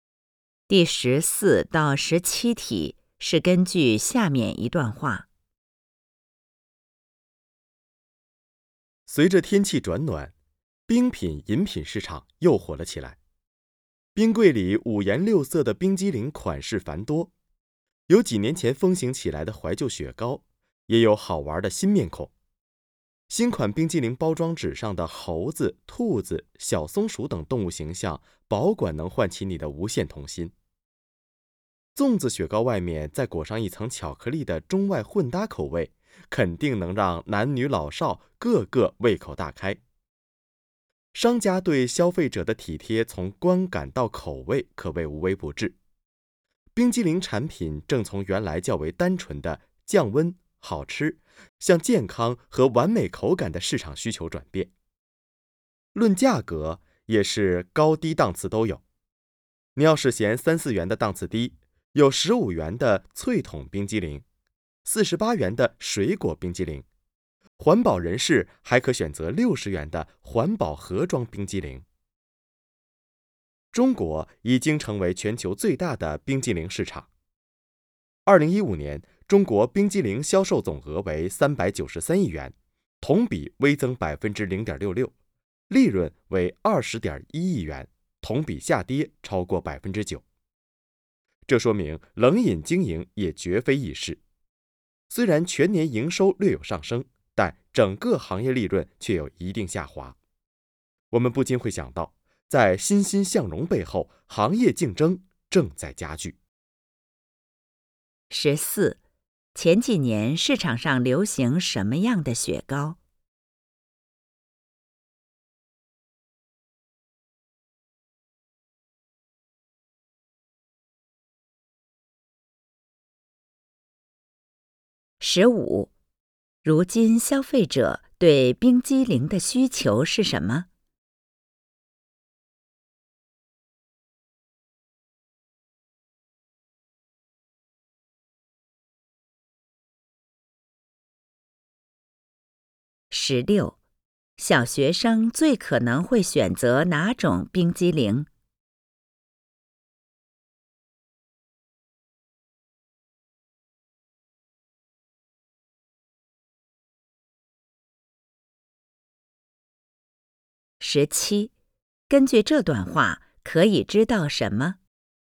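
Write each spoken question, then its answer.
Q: 前几年市场上流行什么样的雪糕?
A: 怀旧雪糕

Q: 如今消费者对冰激凌的需求是什么?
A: 健康和完美口感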